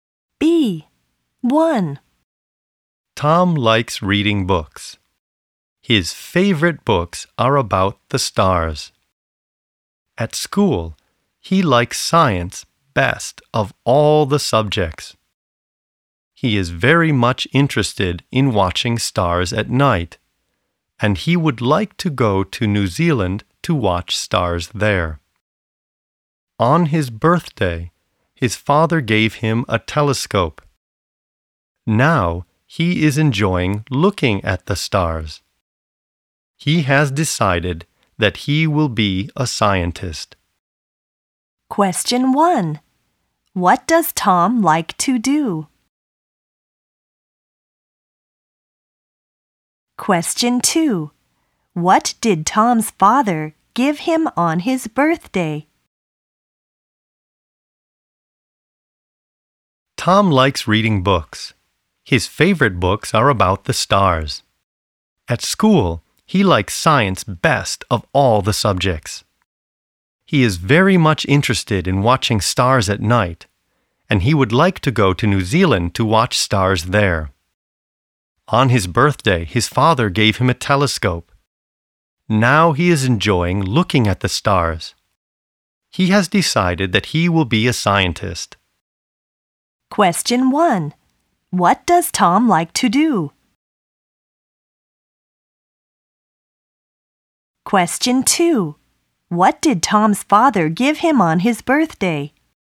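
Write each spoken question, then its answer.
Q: What does Tom like to do?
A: Reading books (about the stars) and watching stars

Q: What did Tom's father give him on his birthday?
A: A telescope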